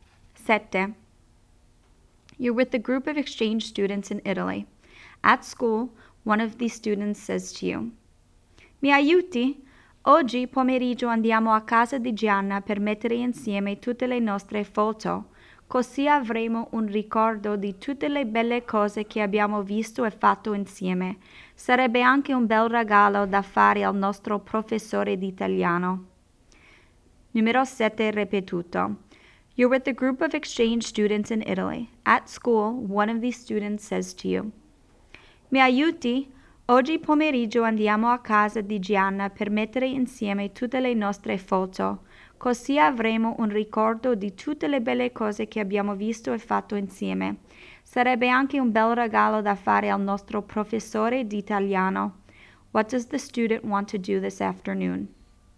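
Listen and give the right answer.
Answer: Put together everyone's photos at Gianna's house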